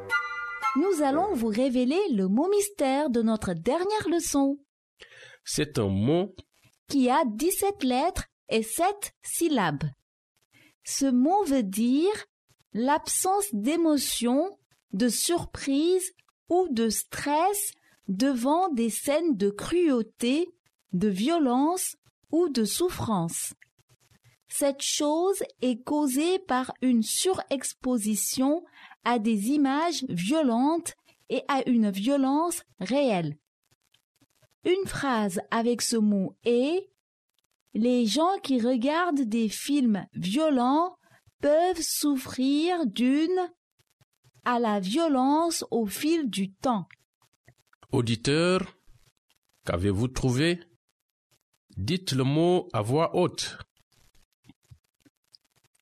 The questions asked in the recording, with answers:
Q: Auditeur, Qu'avez-vous trouvé?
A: Le mot mystère d'aujourd'hui est désensibilisation.